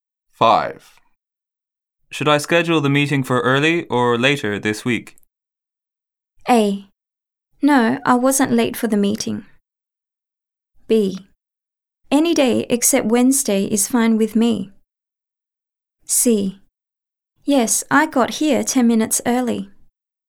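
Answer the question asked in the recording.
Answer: B: Any day except Wednesday is fine with me.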